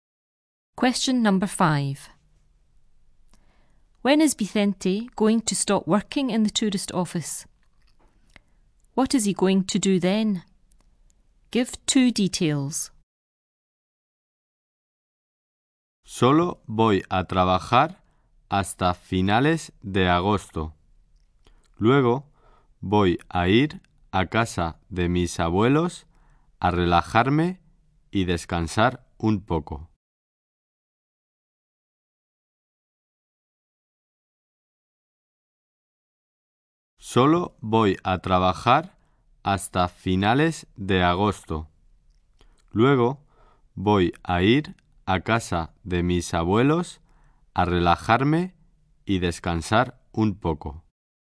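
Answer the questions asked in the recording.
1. At the end of August
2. Go to his grandparents' house to relax and rest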